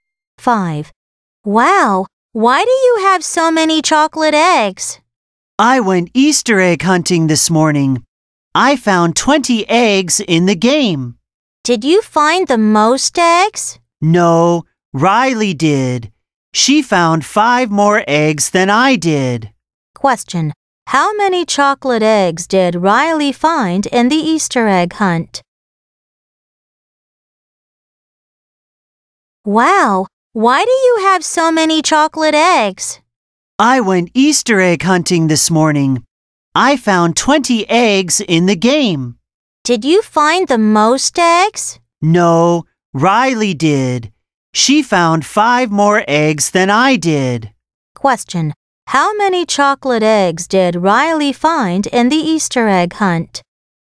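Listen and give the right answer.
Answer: 25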